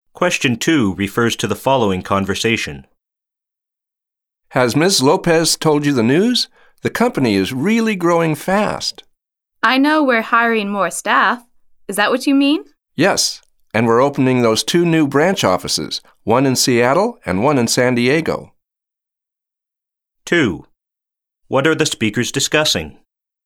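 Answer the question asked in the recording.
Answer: The company's growth: hiring more staff and opening two new branch offices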